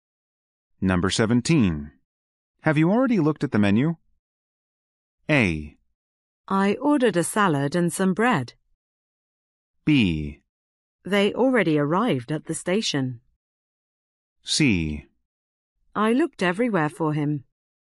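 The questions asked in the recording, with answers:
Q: Have you already looked at the menu?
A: A: I ordered a salad and some bread.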